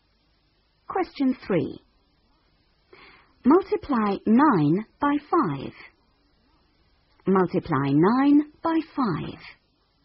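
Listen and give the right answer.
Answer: 45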